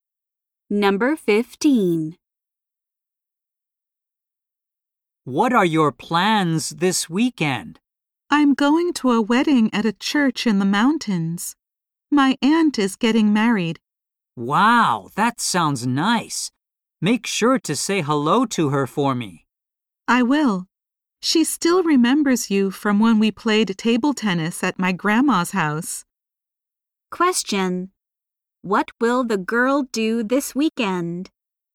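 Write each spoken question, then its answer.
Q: What will the girl do this weekend?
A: Go to her aunt's wedding at a church in the mountains.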